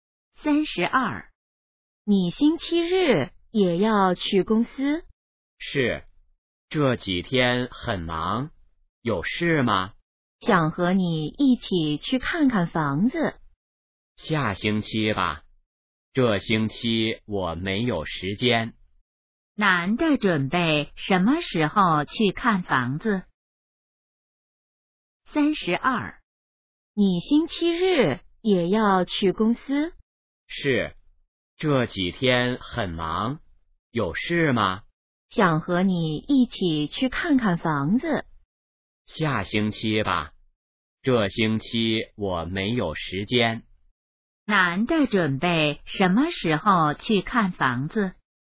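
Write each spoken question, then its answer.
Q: 男的准备什么时候去看房子?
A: 下星期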